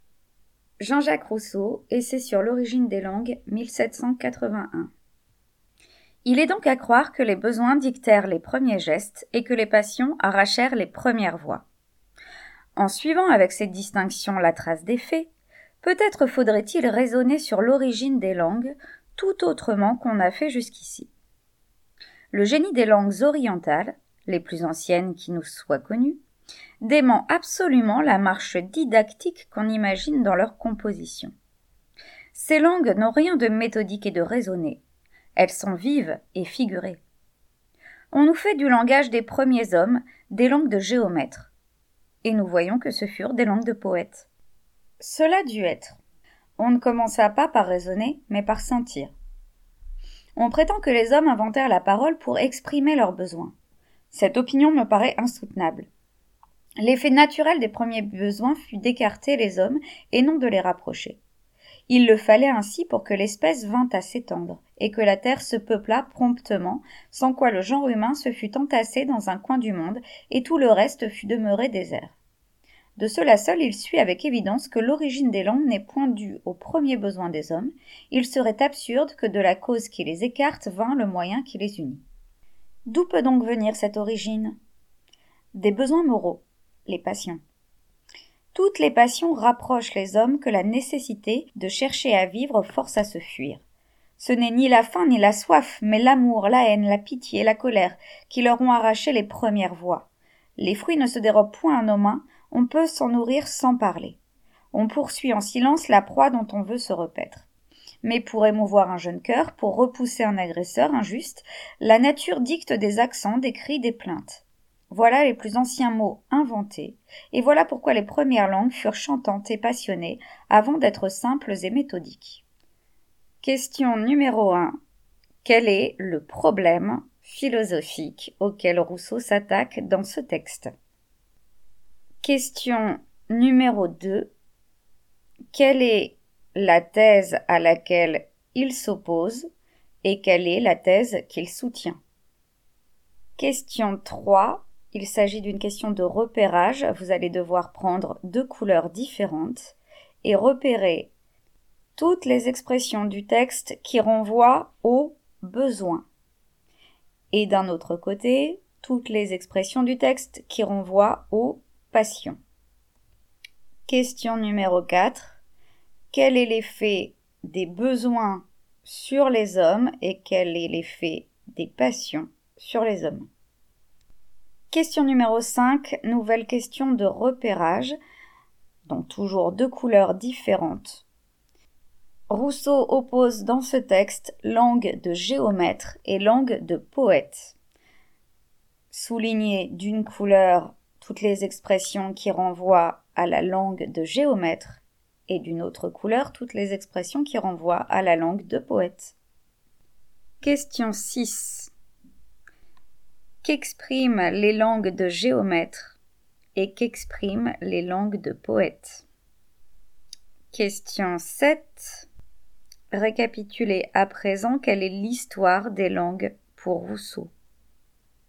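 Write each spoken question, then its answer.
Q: Quel est le problème philosophique auquel Rousseau s'attaque dans ce texte?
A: L'origine des langues

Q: Quelle est la thèse à laquelle il s'oppose et quelle est la thèse qu'il soutient?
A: Il rejette l'idée que la parole est née pour exprimer les besoins ; il soutient qu'elle vient des passions (besoins moraux)

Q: Quel est l'effet des besoins sur les hommes et quel est l'effet des passions sur les hommes?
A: Les besoins écartent les hommes ; les passions les rapprochent

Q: Récapitulez à présent quelle est l'histoire des langues pour Rousseau.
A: Nées des passions, les premières langues étaient chantantes, figurées et passionnées, puis elles sont devenues simples et méthodiques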